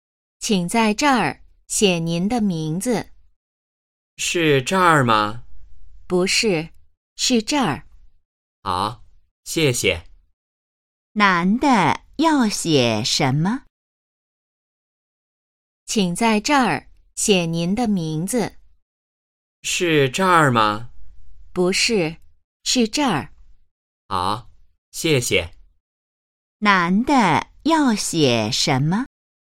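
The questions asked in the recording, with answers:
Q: 男的要写什么?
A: 名字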